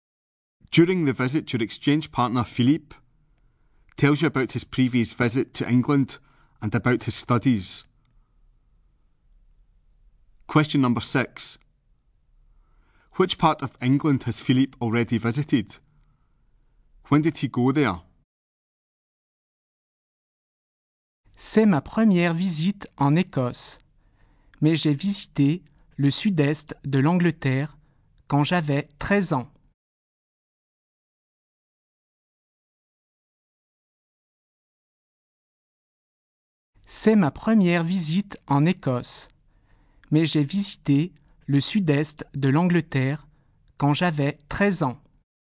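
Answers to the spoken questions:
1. The south-east
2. When he was 13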